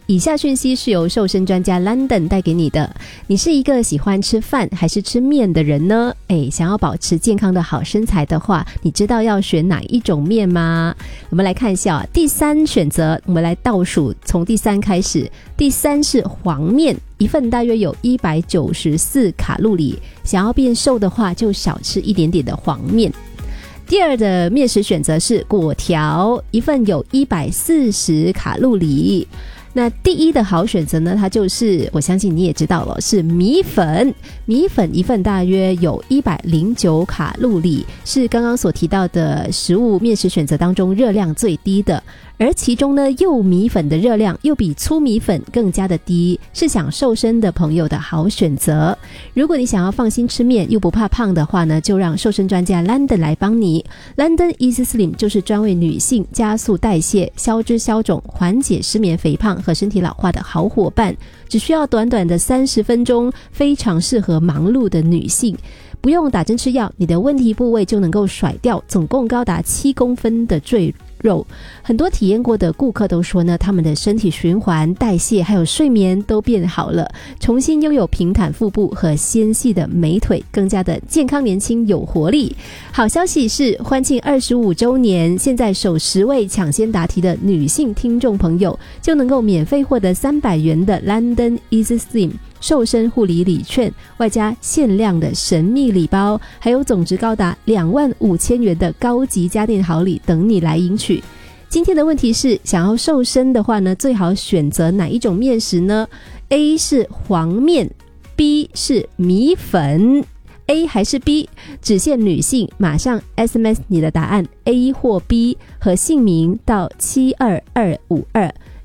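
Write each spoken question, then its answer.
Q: 今天的问题是,想要瘦身的话呢,最好选择哪一种面食呢?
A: B: 米粉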